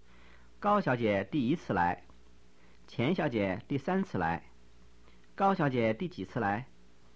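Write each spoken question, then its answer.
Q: 高小姐第几次来?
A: 第一次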